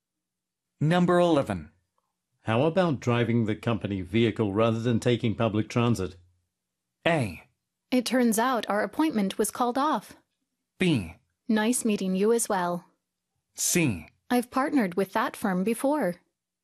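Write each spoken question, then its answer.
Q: How about driving the company vehicle rather than taking public transit?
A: A: It turns out our appointment was called off.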